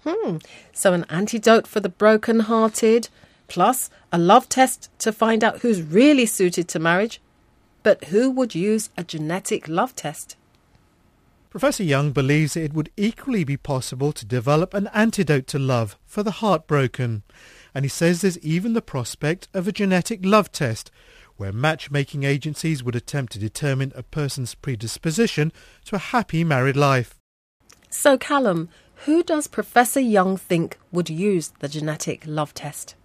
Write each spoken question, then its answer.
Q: So, Callum, who does Professor Young think would use the genetic love test?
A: Matchmaking agencies, companies that charge people money to help them find their perfect partner, a husband or a wife.